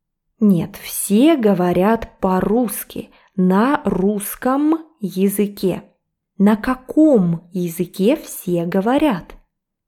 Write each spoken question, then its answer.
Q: На каком языке все говорят?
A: Все говорят на русском языке.